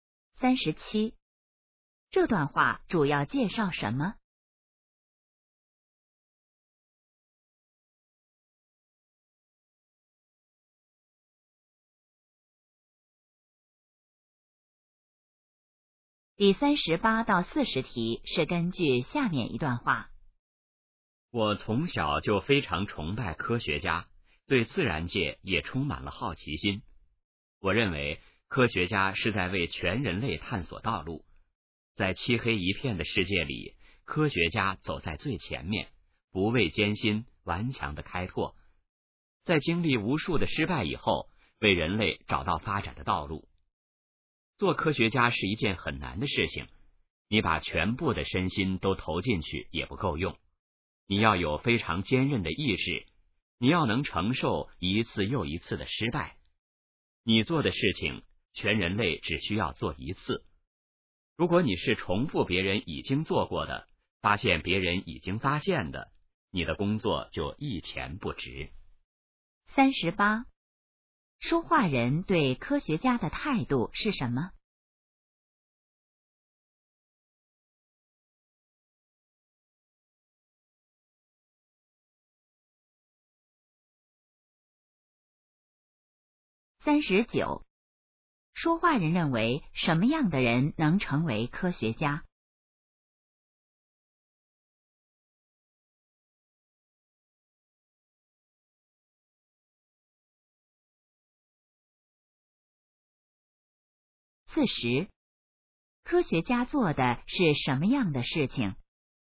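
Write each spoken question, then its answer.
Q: 说话人对科学家的态度是什么?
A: 崇拜

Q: 说话人认为什么样的人能成为科学家?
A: 意志坚韧、能承受一次次失败的人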